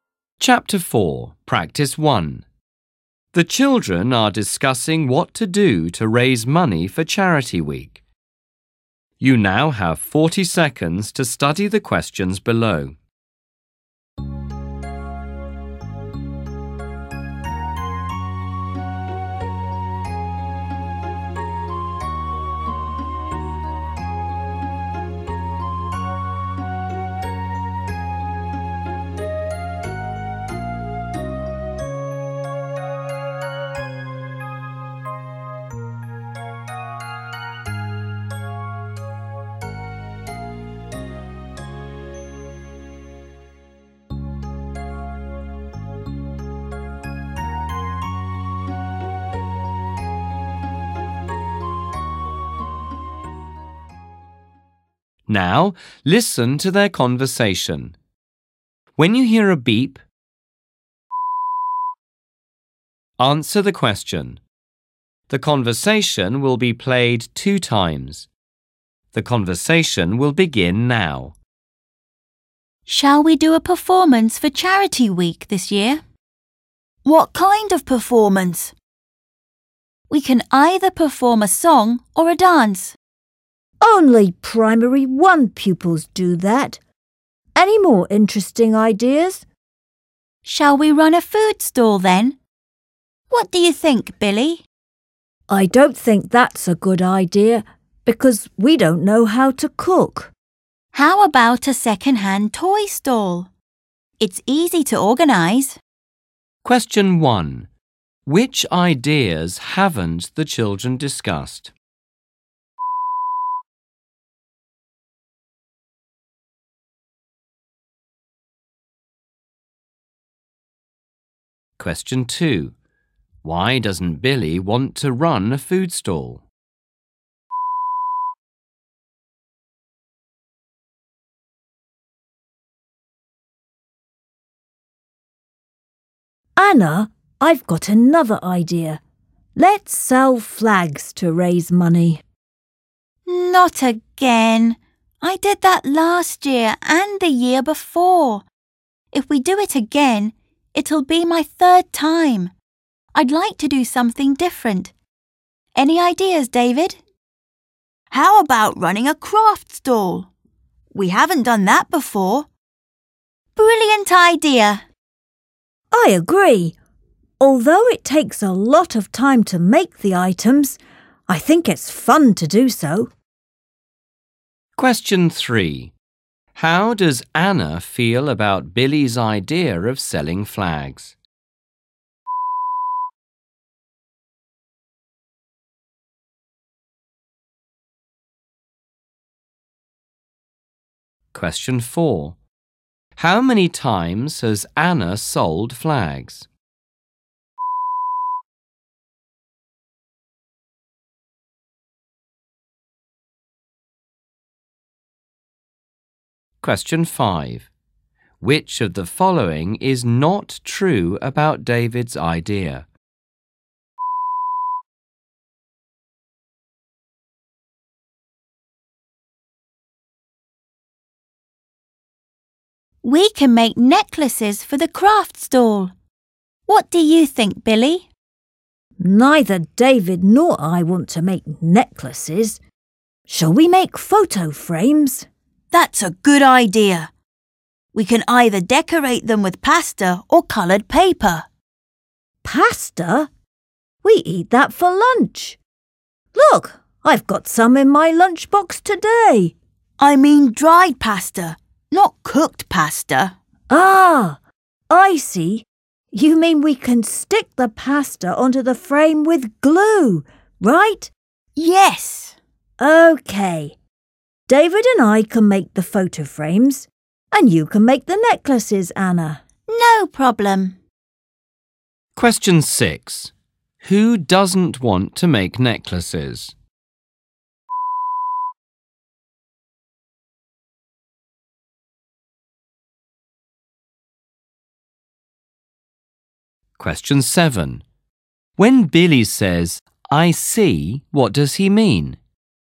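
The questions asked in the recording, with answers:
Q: Why doesn't Billy want to run a food stall?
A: Because they don't know how to cook.

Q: How many times has Anna sold flags?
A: Twice

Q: Who doesn't want to make necklaces?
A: Billy and David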